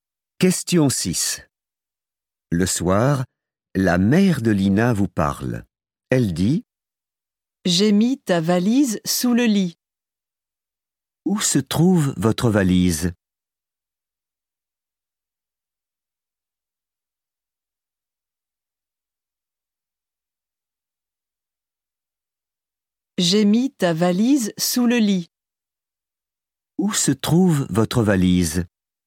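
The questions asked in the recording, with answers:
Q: Où se trouve votre valise?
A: sous le lit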